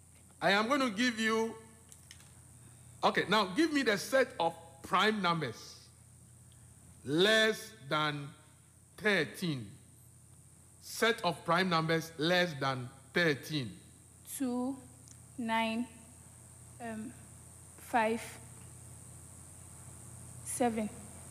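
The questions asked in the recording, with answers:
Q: Set of prime numbers less than 13.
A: 2, 3, 5, 7, 11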